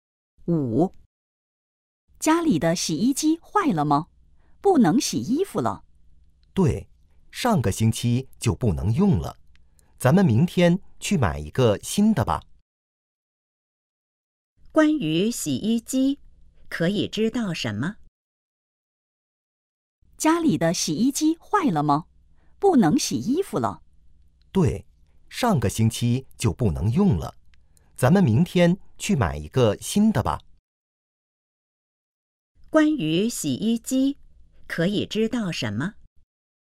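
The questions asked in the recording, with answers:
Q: 关于洗衣机,可以知道什么?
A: 坏了,上个星期就不能用了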